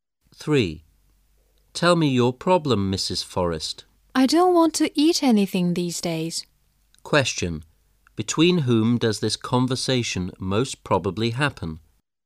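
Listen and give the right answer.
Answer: A doctor and a patient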